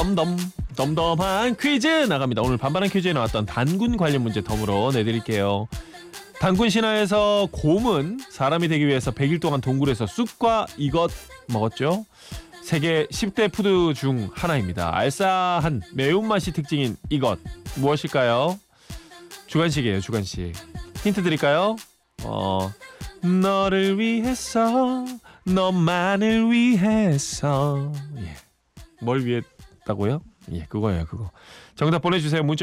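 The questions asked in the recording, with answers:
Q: 단군 신화에서 곰은 사람이 되기 위해서 100일 동안 동굴에서 쑥과 이것 먹었죠. 세계 10대 푸드 중 하나입니다. 알싸한 매운맛이 특징인 이것 무엇일까요?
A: 마늘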